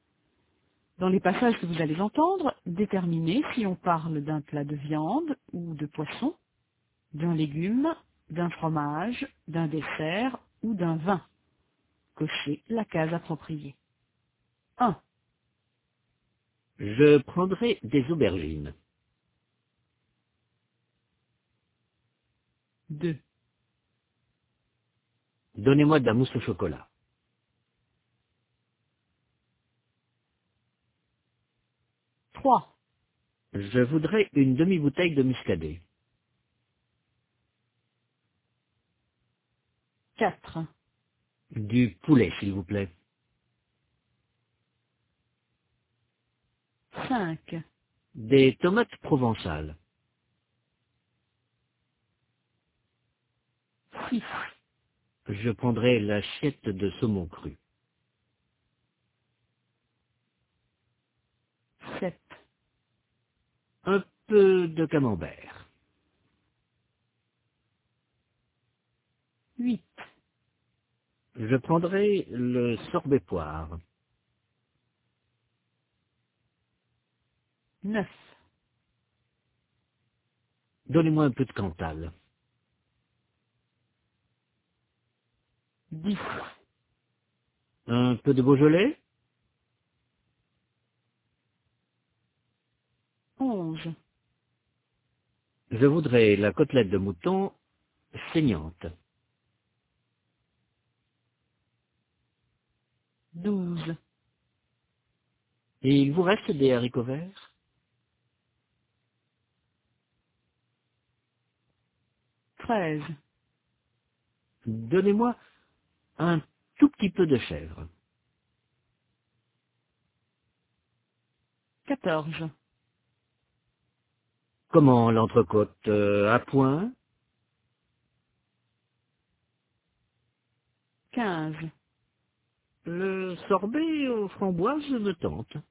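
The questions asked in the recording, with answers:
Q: Je prendrai des aubergines.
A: un légume

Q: Donnez-moi de la mousse au chocolat.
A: un dessert

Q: Je voudrais une demi-bouteille de muscadet.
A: un vin

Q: Du poulet, s'il vous plaît.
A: un plat de viande ou de poisson

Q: Des tomates provençales.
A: un légume

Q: Je prendrai l'assiette de saumon cru.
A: un plat de viande ou de poisson

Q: Un peu de camembert.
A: un fromage

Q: Je prendrai le sorbet poire.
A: un dessert

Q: Donnez-moi un peu de cantal.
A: un fromage

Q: Un peu de Beaujolais.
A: un vin

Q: Je voudrais la côtelette de mouton saignante.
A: un plat de viande ou de poisson

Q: Et il vous reste des haricots verts?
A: un légume

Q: Donnez-moi un tout petit peu de chèvre.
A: un fromage

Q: Comment l'entrecôte, à point?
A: un plat de viande ou de poisson

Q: Le sorbet aux framboises me tente.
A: un dessert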